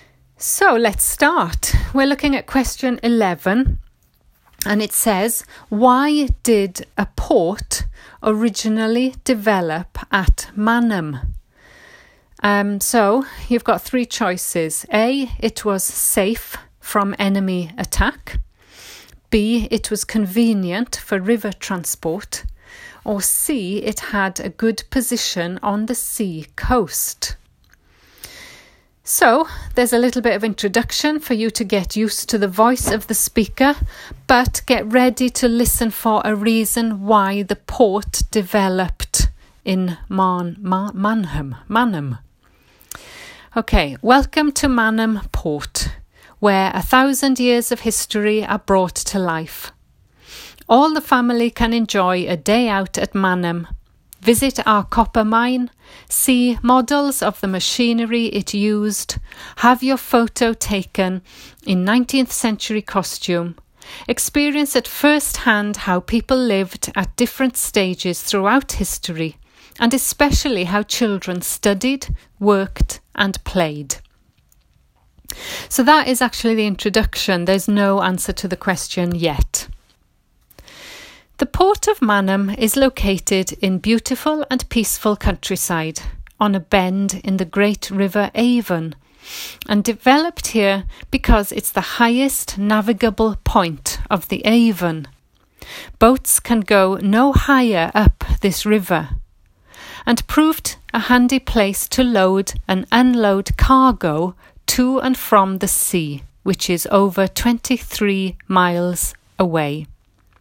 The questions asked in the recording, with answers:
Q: why did a port originally develop at Manham?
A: So the answer is B, it was convenient for river transport.